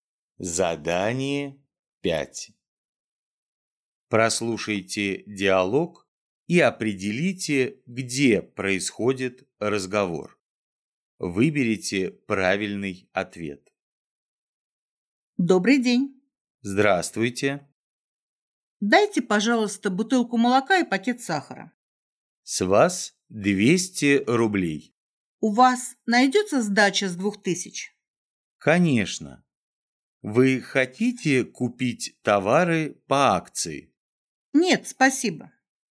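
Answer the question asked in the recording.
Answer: В магазине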